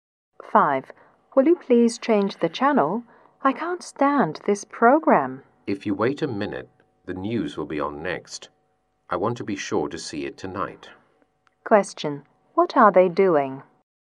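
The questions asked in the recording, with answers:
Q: What are they doing?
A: Watching TV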